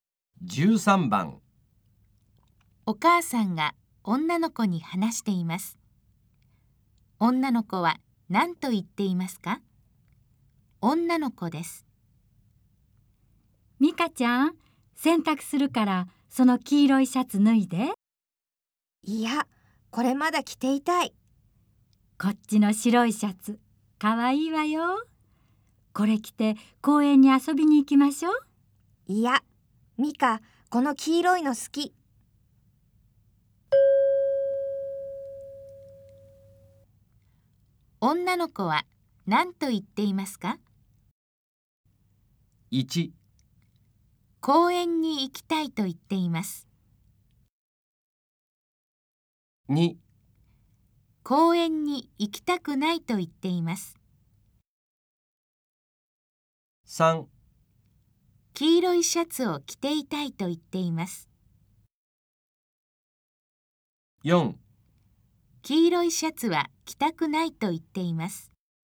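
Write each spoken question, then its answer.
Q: 女の子は何と言っていますか?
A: 3: 黄色いシャツを着ていたいと言っています。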